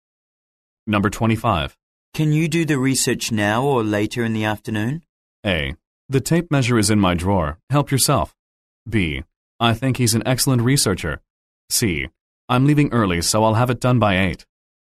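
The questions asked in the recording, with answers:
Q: Can you do the research now or later in the afternoon?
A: C: I'm leaving early, so I'll have it done by 8.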